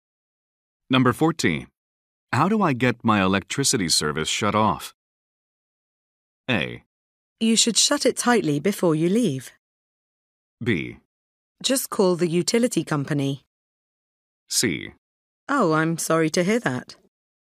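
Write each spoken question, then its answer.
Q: How do I get my electricity service shut off?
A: B: Just call the utility company.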